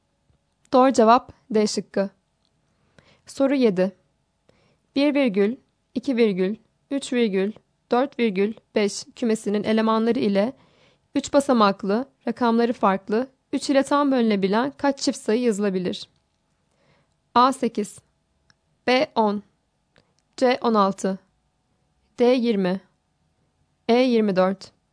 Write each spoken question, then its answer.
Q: 1 virgül, 2 virgül, 3 virgül, 4 virgül, 5 kümesinin elemanları ile 3 basamaklı, rakamları farklı, 3 ile tam bölünebilen kaç çift sayı yazılabilir?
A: Doğru cevap A şıkkı.